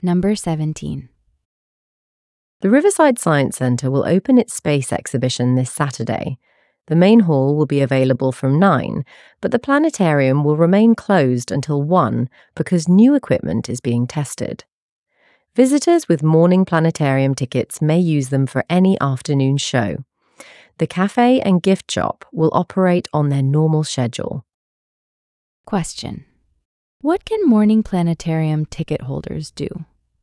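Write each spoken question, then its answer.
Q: what can morning planetarium ticket holders do?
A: Use their tickets for any afternoon show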